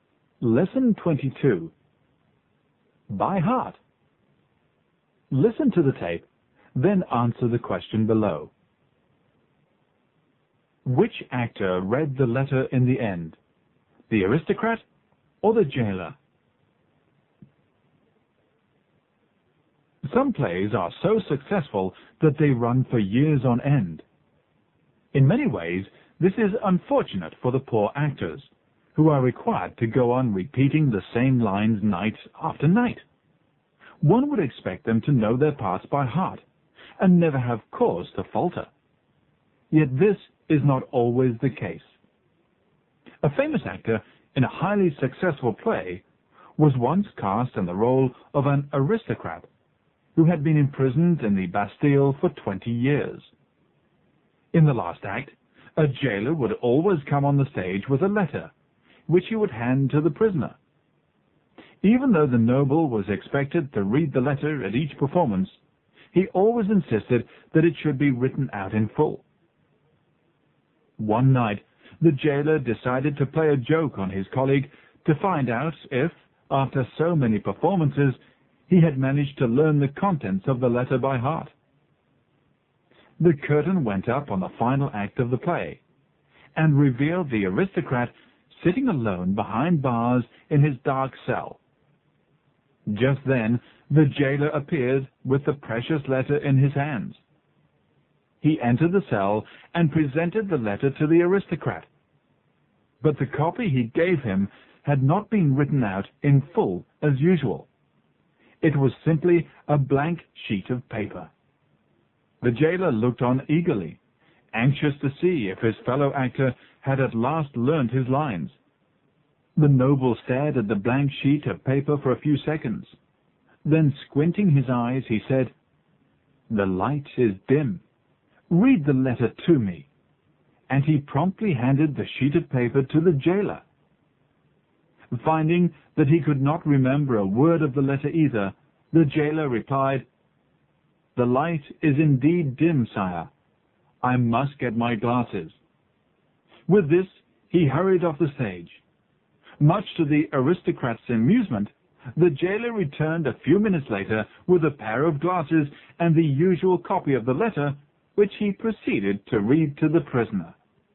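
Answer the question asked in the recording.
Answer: The jailer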